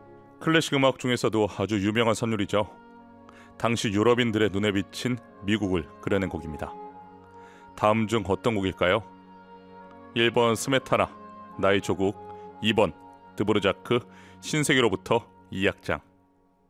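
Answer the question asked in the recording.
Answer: 2: 드보르자크, 신세계로부터 2악장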